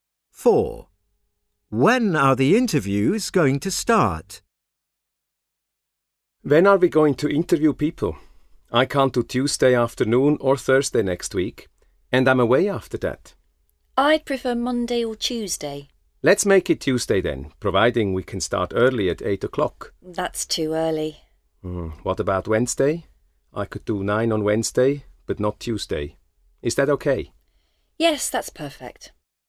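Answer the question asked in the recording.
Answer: Wednesday at 9 o'clock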